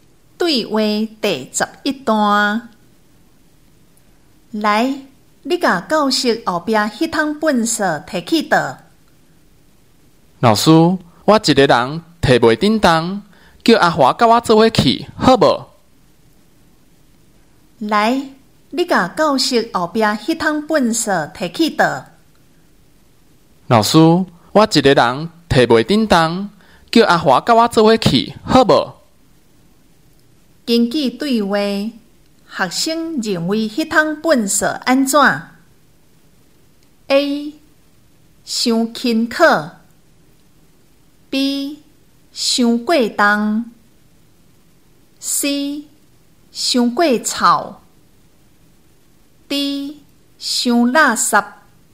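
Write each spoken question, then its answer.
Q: 根据对话,学生认为那趟粪扫安怎 ?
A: B: 伤过重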